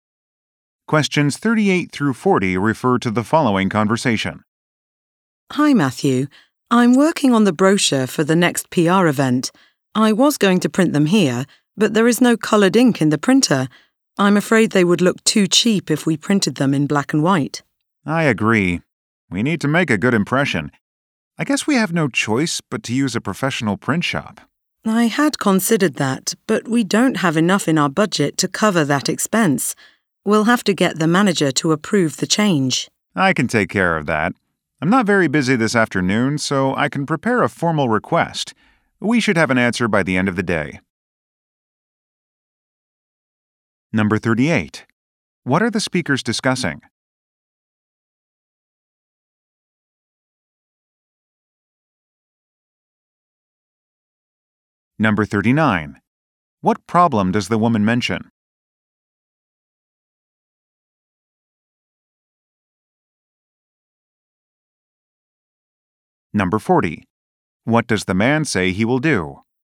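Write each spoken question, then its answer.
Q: What are the speakers discussing?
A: Printing brochures for a PR event

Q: What problem does the woman mention?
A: There is no colored ink in the printer

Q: What does the man say he will do?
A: Prepare a formal request to the manager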